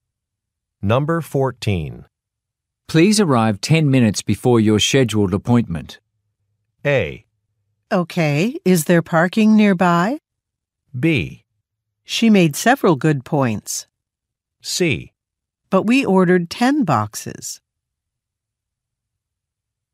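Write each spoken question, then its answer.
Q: Please arrive 10 minutes before your scheduled appointment.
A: A: Okay, is there parking nearby?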